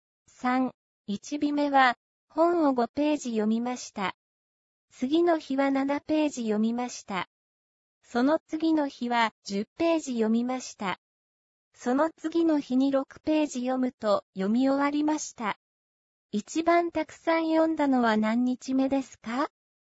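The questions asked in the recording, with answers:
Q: 一番たくさん読んだのは何日目ですか?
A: 3日目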